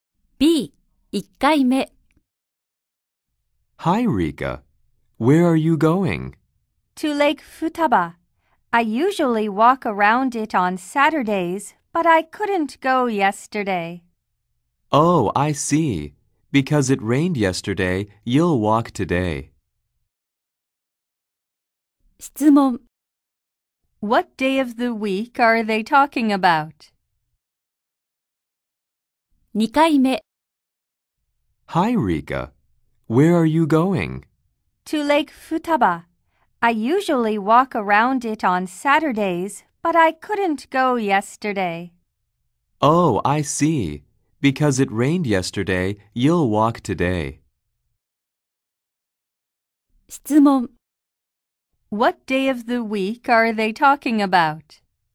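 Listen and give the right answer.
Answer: Sunday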